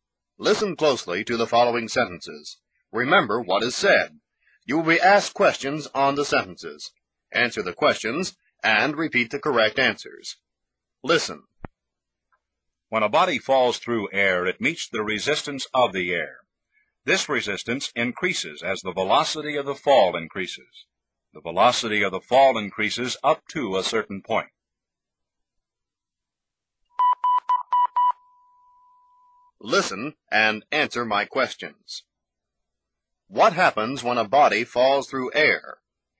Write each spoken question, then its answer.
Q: What happens when a body falls through air?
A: It meets the resistance of the air.